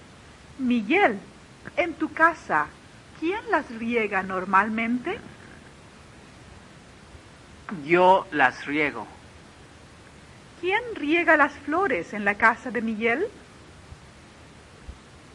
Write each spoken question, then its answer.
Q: ¿Quién riega las flores en la casa de Miguel?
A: Miguel riega las flores, o las riega Miguel.